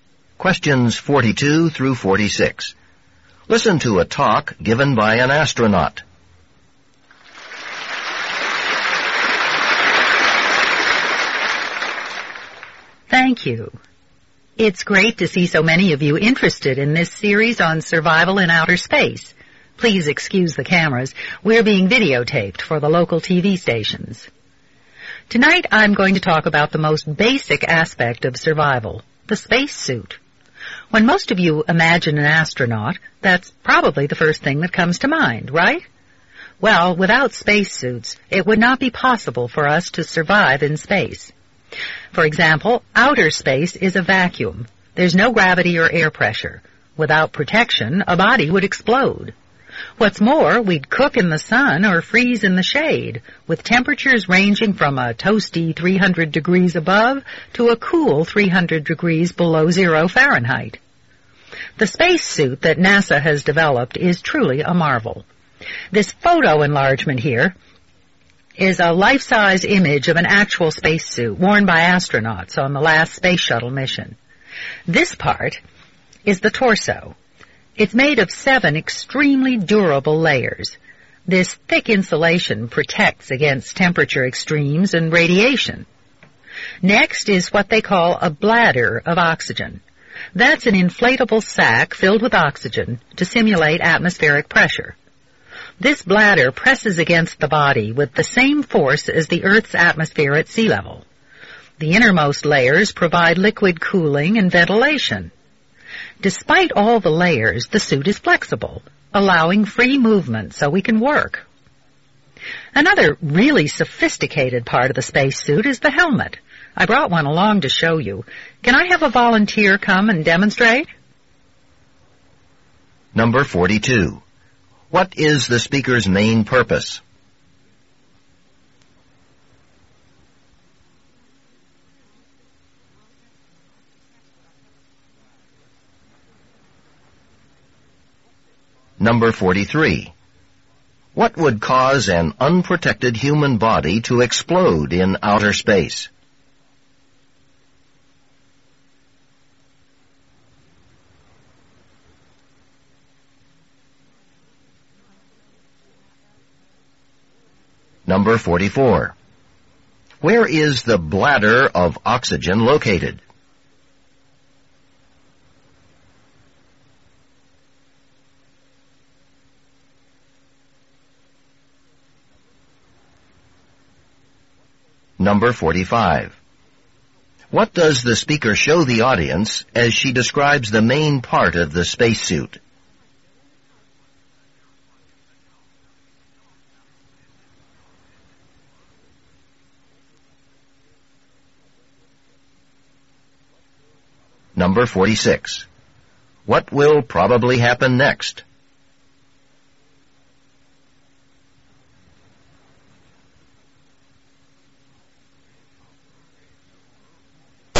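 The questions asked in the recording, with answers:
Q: What is the speaker's main purpose?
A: To explain how the spacesuit helps astronauts survive in space

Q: What would cause an unprotected human body to explode in outer space?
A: The vacuum: no air pressure

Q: Where is the bladder of oxygen located?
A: In the torso, among its layers

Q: What does the speaker show the audience as she describes the main part of the spacesuit?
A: A life-size photo enlargement of a spacesuit

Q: What will probably happen next?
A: A volunteer will demonstrate the helmet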